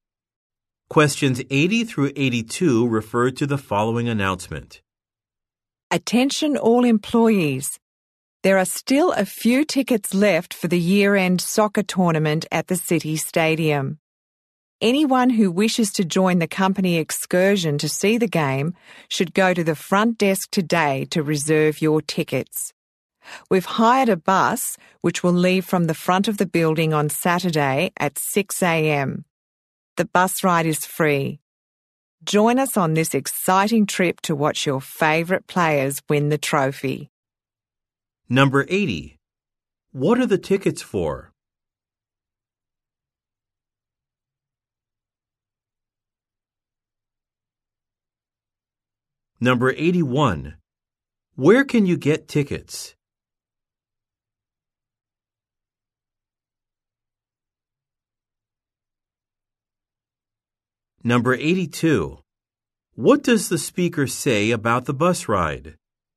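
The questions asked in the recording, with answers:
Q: What are the tickets for?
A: A soccer tournament

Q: Where can you get tickets?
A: At the front desk

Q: What does the speaker say about the bus ride?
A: It is free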